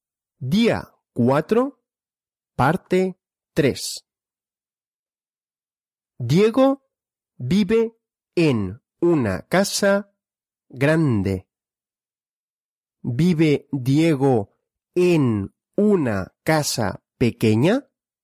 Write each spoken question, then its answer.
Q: ¿Vive Diego en una casa pequeña?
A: No. Diego no vive en una casa pequeña.